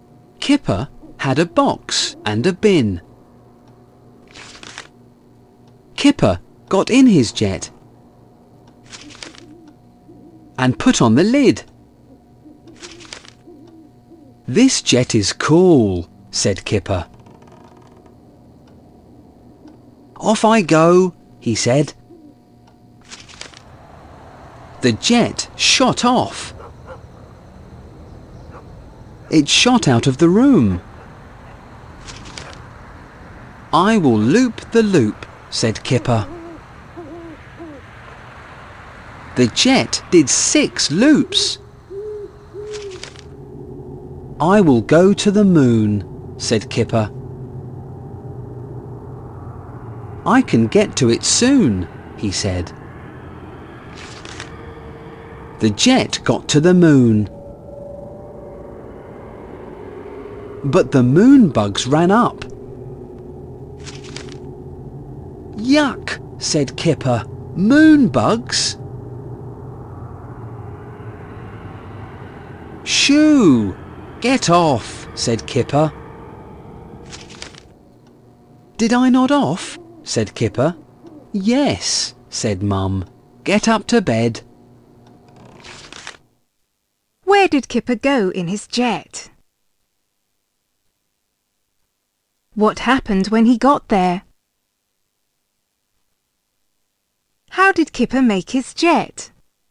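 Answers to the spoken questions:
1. To the moon
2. The moon bugs ran up
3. From a box and a bin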